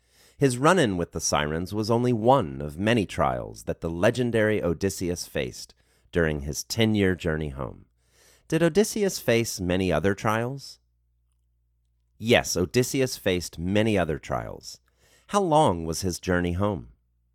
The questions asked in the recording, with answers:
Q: How long was his journey home?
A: His journey home was 10 years.